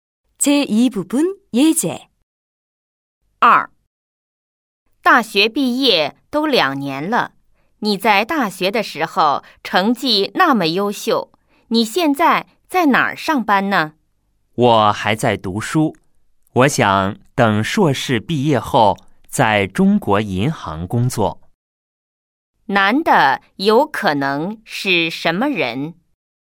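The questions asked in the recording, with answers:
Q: 男的有可能是什么人?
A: 学生(在读硕士)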